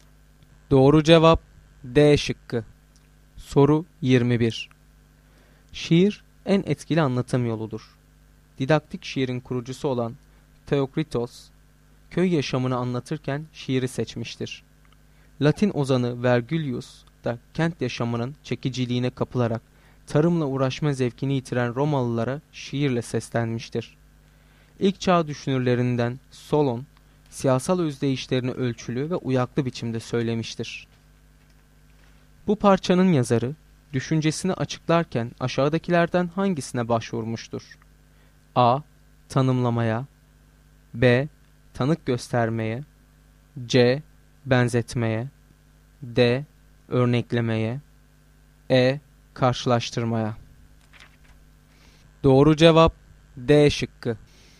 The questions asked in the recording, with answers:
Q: Bu parçanın yazarı, düşüncesini açıklarken aşağıdakilerden hangisine başvurmuştur?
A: Doğru cevap D şıkkı.